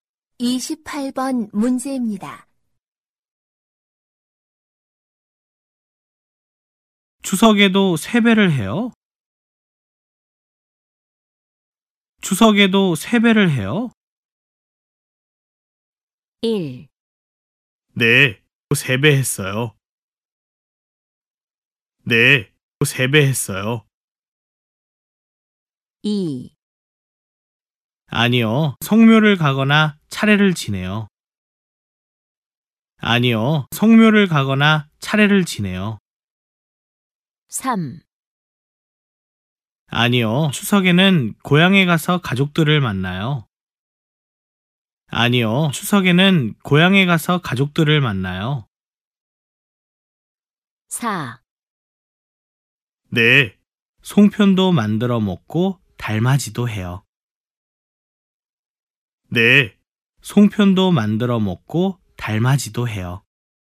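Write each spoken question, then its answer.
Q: 추석에도 세배를 해요?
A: 2: 아니요, 성묘를 가거나 차례를 지내요.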